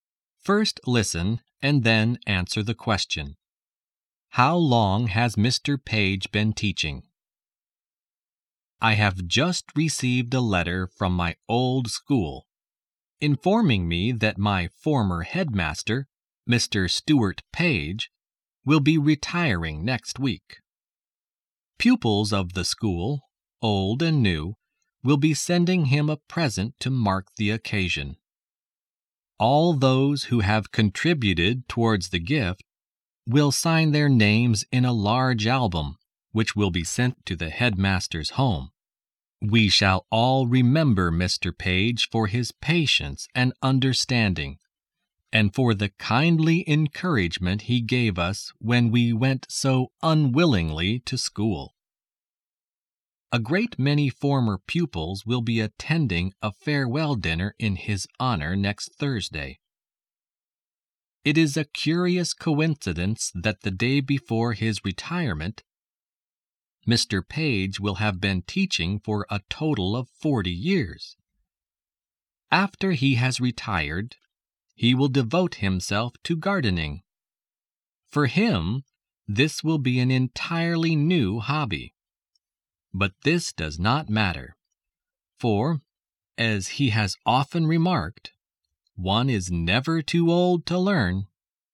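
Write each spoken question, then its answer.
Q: How long has Mr. Page been teaching?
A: For (almost) 40 years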